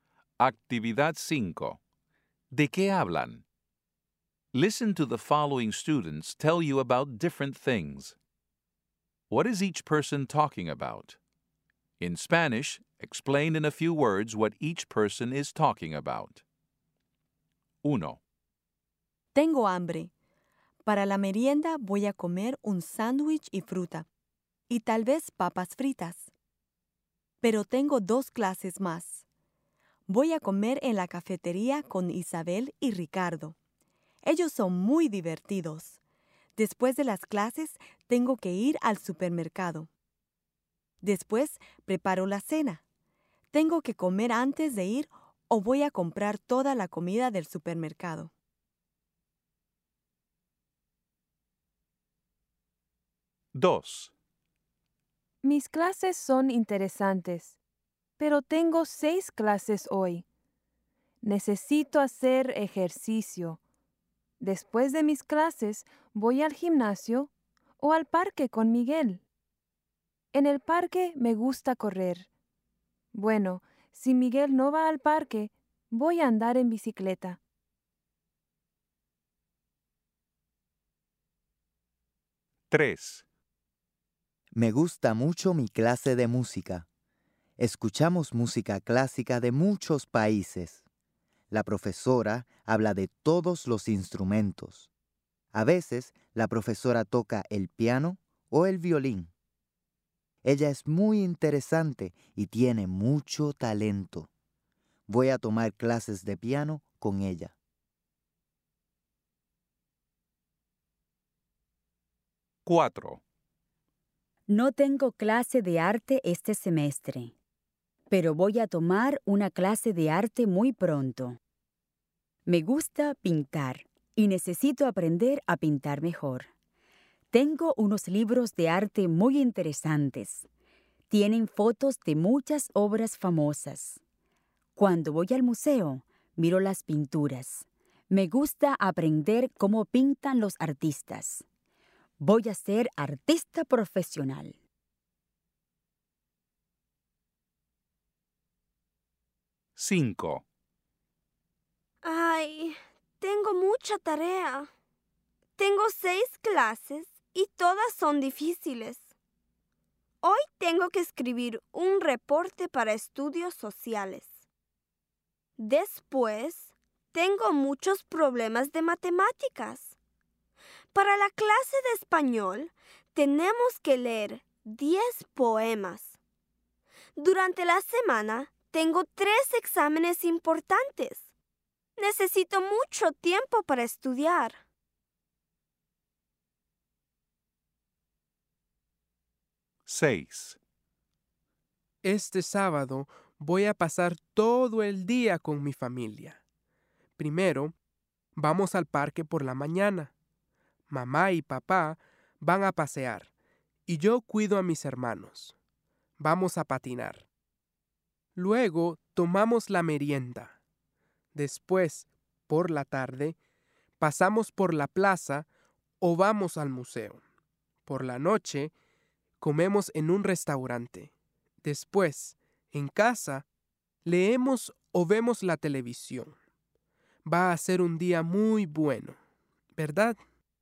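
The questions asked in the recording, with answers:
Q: What is each person talking about?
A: Su clase de música

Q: What is each person talking about?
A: El arte y la pintura

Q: What is each person talking about?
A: Tiene mucha tarea

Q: What is each person talking about?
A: Un sábado con su familia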